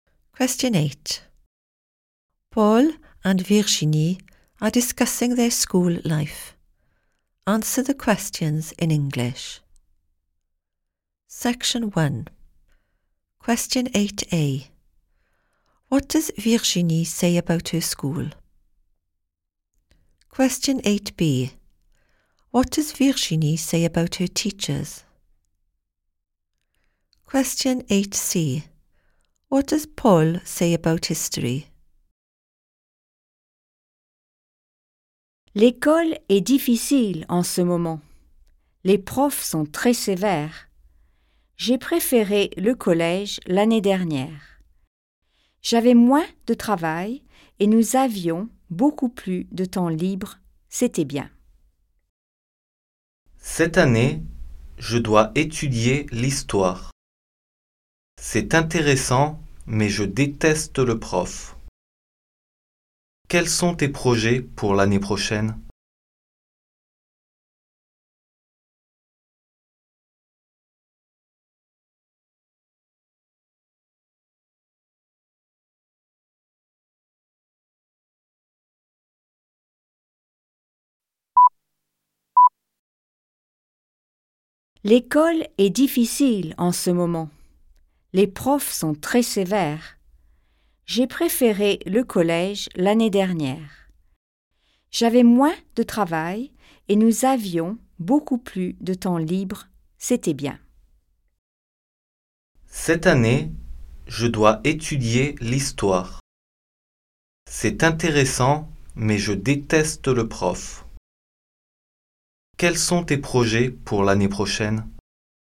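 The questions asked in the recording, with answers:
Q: What does Virginie say about her school?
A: It is difficult at the moment

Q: What does Virginie say about her teachers?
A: They are very strict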